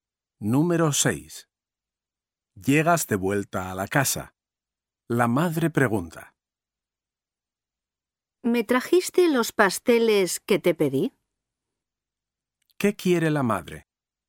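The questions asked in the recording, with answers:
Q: ¿Qué quiere la madre?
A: los pasteles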